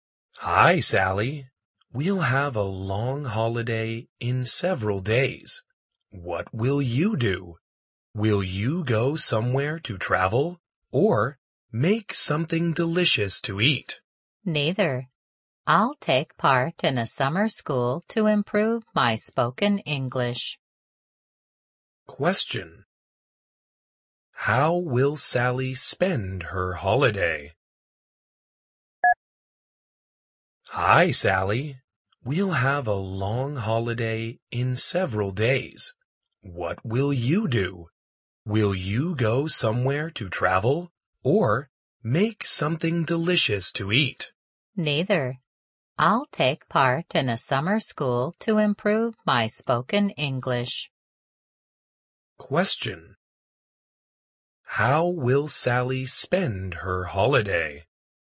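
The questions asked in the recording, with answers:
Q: How will Sally spend her holiday?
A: By going to a summer school to improve her spoken English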